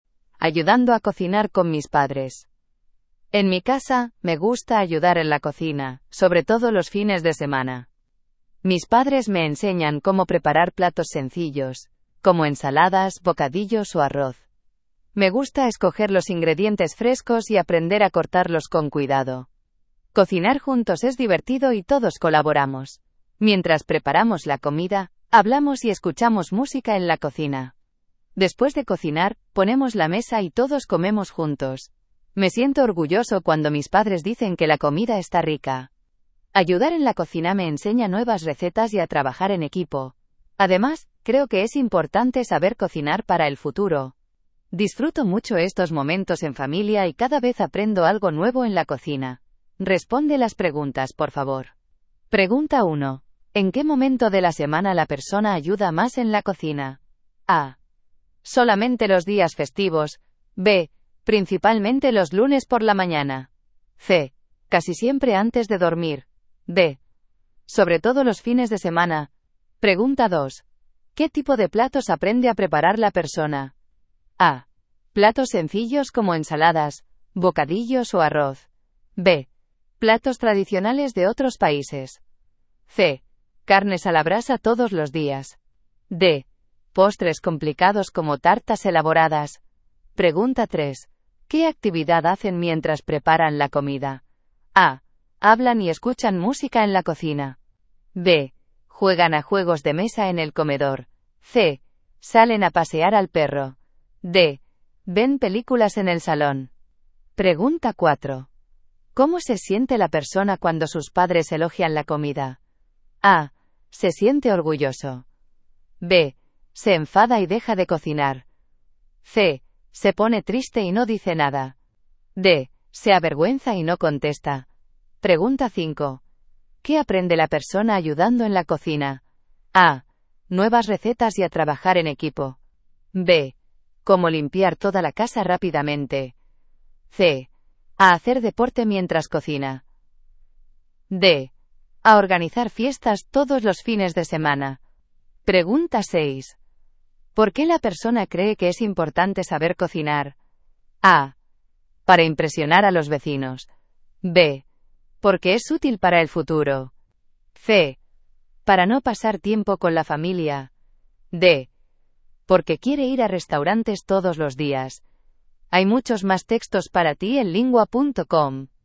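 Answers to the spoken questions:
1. D: Sobre todo los fines de semana.
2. A: Platos sencillos como ensaladas, bocadillos o arroz.
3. A: Hablan y escuchan música en la cocina.
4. A: Se siente orgulloso.
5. A: Nuevas recetas y a trabajar en equipo.
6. B: Porque es útil para el futuro.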